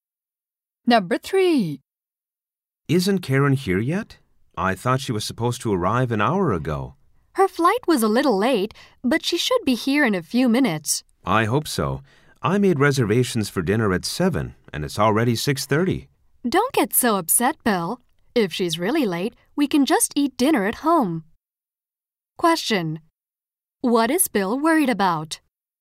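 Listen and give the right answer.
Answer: That Karen will be too late for their 7 o'clock dinner reservation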